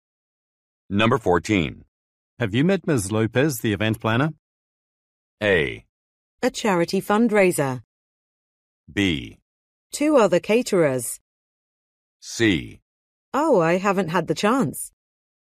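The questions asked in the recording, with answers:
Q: Have you met Ms. Lopez, the event planner?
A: C: Oh, I haven't had the chance.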